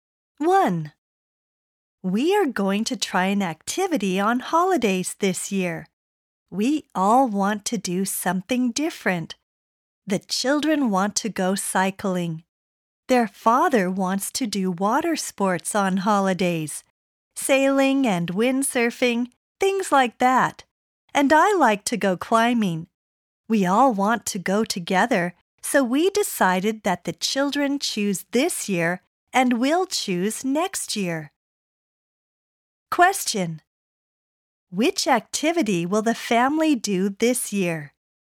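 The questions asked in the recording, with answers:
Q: Which activity will the family do this year?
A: cycling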